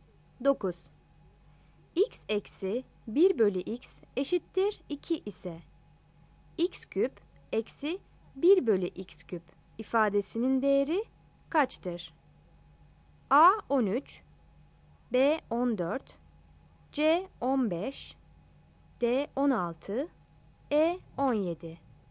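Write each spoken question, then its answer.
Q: X eksi 1 bölü x eşittir 2 ise x küp eksi 1 bölü x küp ifadesinin değeri kaçtır?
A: B: 14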